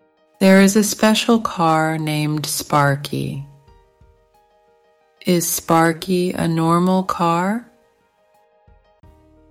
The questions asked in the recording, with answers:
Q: Is Sparky a normal car?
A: No, he's not. He's a special car.